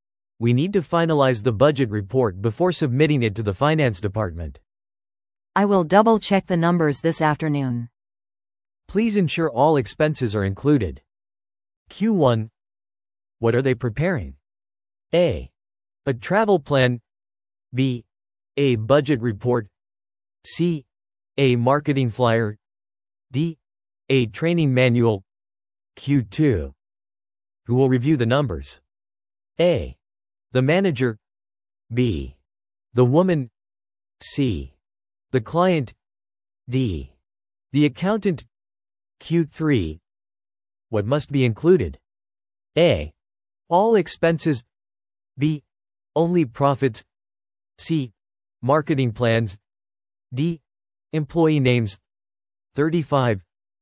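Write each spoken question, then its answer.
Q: What are they preparing?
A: B: A budget report.

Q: What must be included?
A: A: All expenses.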